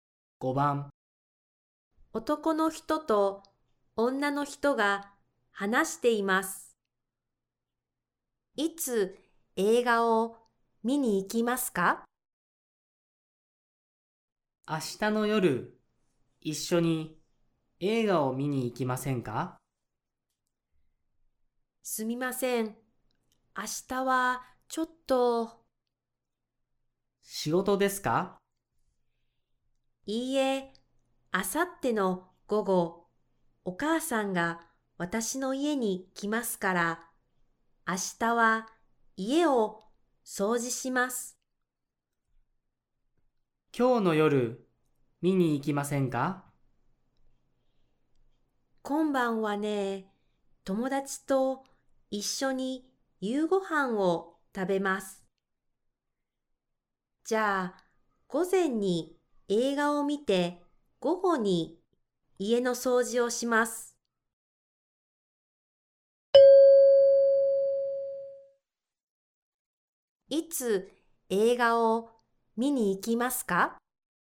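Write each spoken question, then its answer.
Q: いつ映画を見に行きますか?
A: 明日の午前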